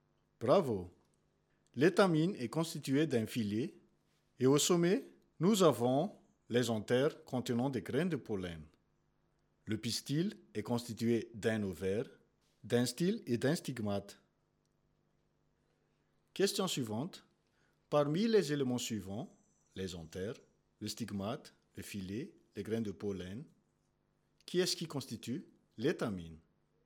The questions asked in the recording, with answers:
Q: Parmi les éléments suivants, les anthères, le stigmate, le filet, les grains de pollen, qui est-ce qui constitue l'étamine?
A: Les anthères, le filet et les grains de pollen constituent l'étamine.